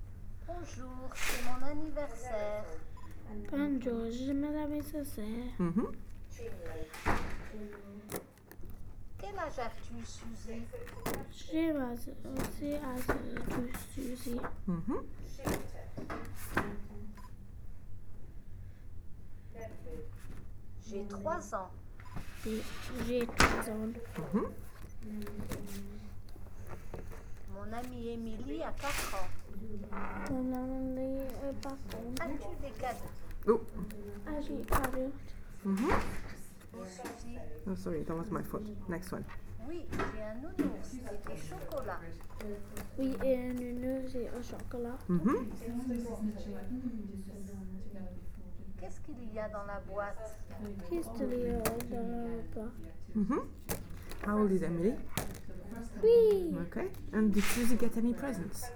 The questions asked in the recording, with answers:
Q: And did Susie get any presents?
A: Yeah.